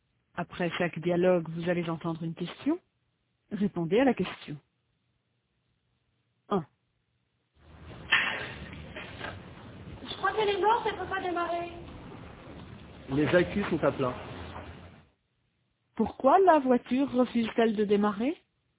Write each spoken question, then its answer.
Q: Pourquoi la voiture refuse-t-elle de démarrer?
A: Parce que les accus sont à plat.